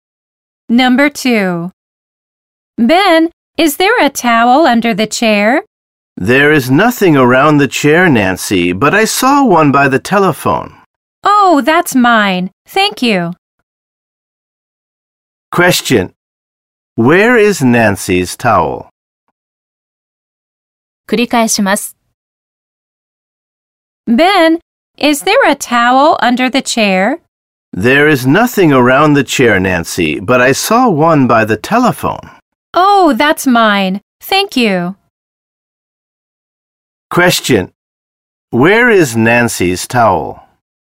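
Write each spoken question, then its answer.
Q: Where is Nancy's towel?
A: By the telephone.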